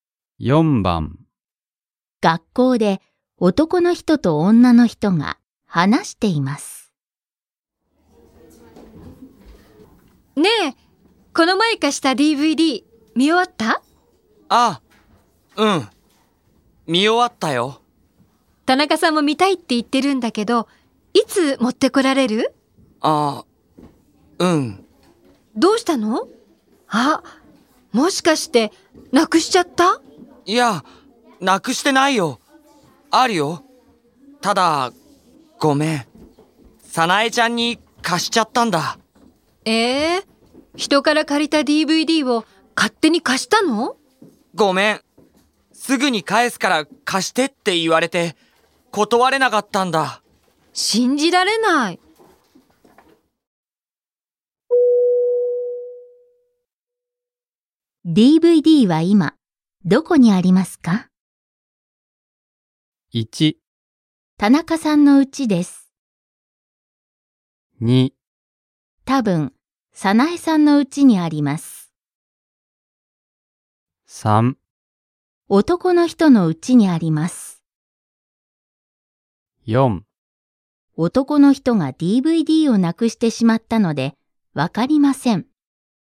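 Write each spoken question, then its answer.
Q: DVD は今どこにありますか?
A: 2: 多分早苗さんの家にあります。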